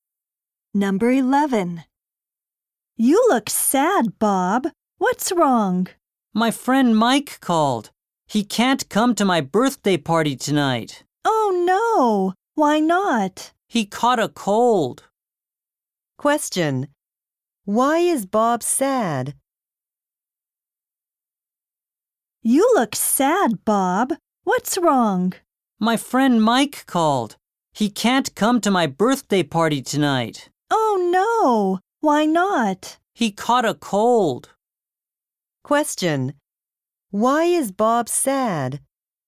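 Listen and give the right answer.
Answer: His friend Mike can't come to his birthday party.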